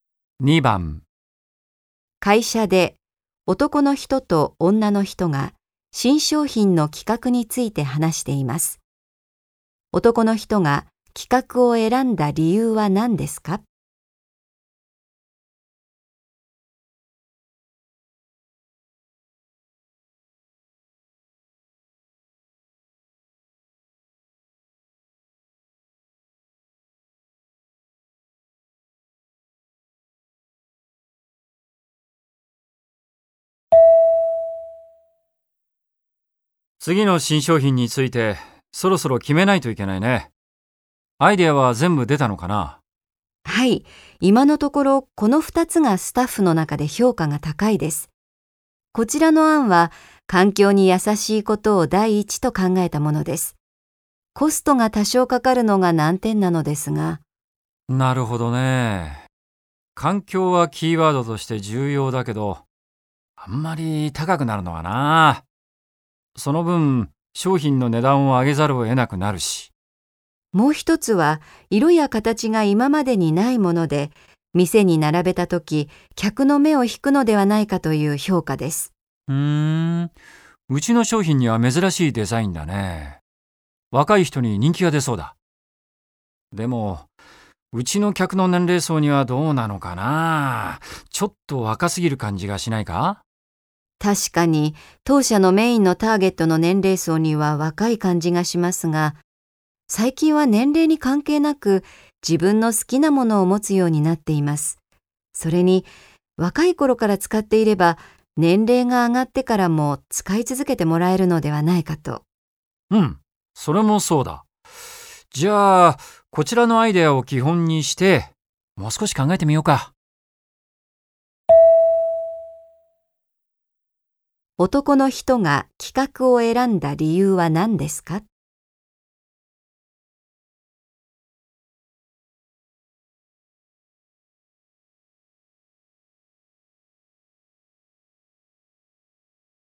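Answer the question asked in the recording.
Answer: 若い頃から使えば、年齢が上がっても使い続けてもらえるから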